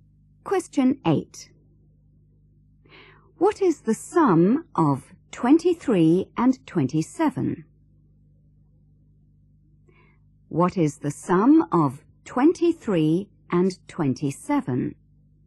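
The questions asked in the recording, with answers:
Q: What is the sum of 23 and 27?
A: 50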